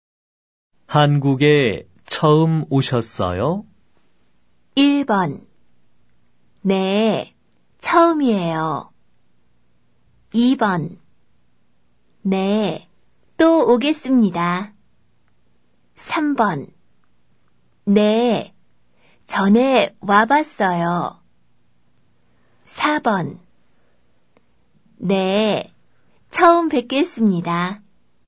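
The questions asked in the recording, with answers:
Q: 한국에 처음 오셨어요?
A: 1: 네, 처음이에요.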